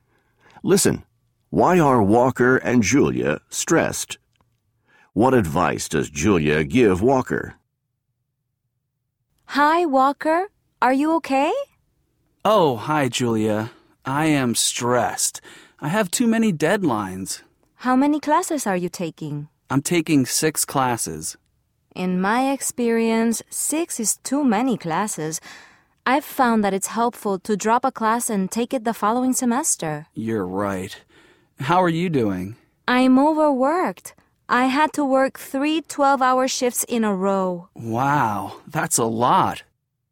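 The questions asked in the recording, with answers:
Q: Why are Walker and Julia stressed?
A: Walker has too many deadlines from taking 6 classes; Julia is overworked after working three 12-hour shifts in a row.

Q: What advice does Julia give Walker?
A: To drop a class and take it the following semester.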